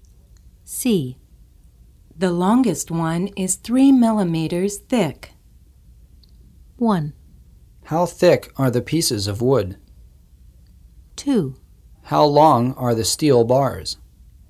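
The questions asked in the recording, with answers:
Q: How thick are the pieces of wood?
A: 1: How thick are the pieces of wood?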